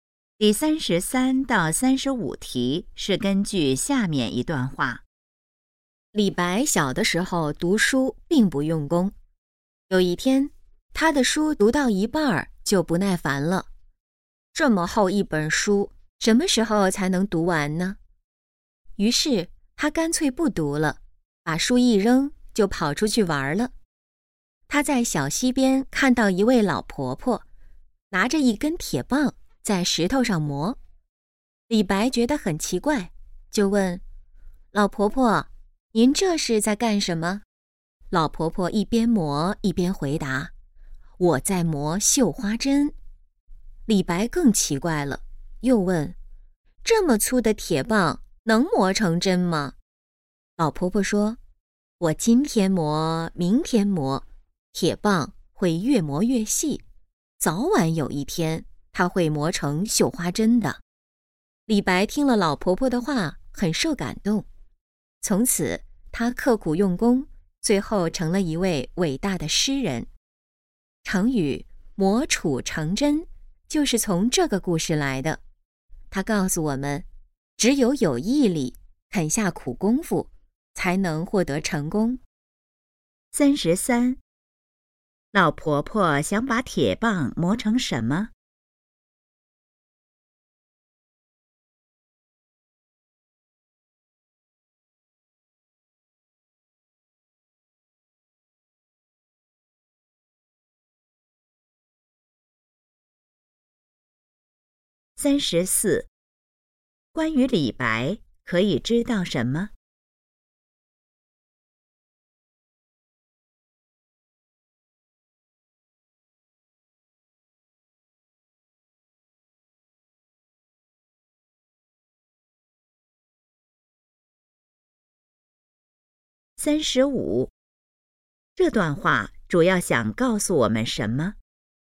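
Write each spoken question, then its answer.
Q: 老婆婆想把铁棒磨成什么?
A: 绣花针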